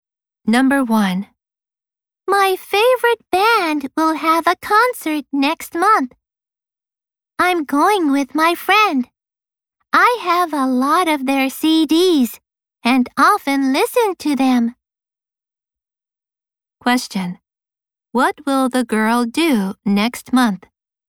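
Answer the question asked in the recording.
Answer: Go to a concert with her friend.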